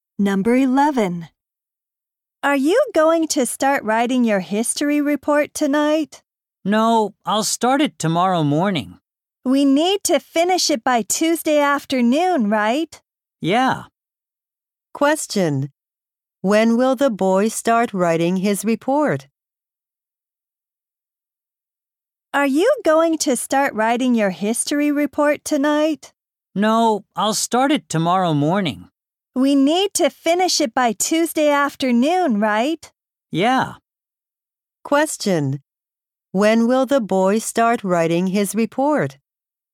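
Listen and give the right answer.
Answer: Tomorrow morning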